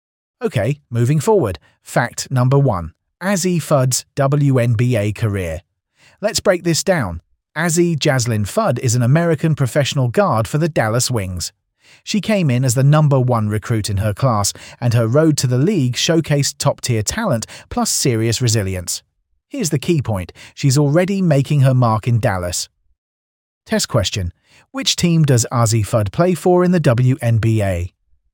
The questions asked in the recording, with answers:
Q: Which team does Azzy Fudd play for in the WNBA?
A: Correct answer, Dallas Wings.